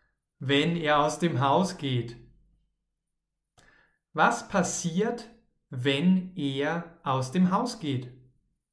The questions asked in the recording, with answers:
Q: Was passiert, wenn er aus dem Haus geht?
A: Dann beginnt es zu regnen.